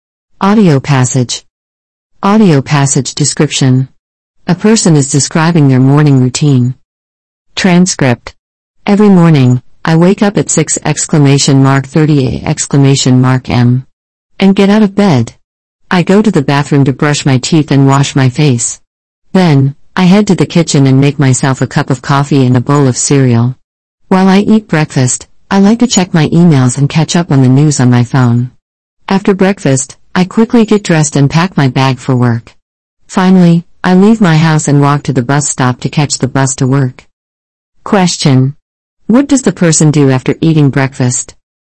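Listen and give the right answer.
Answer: Gets dressed quickly and packs their bag for work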